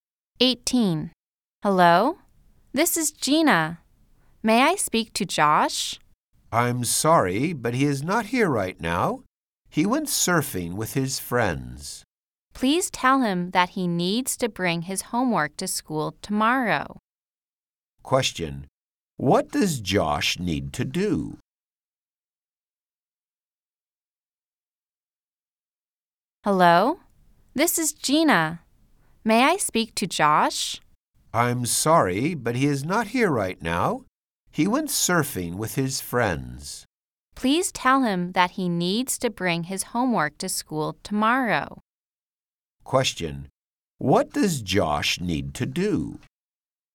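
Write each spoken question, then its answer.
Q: Question. What does Josh need to do?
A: Bring his homework to school tomorrow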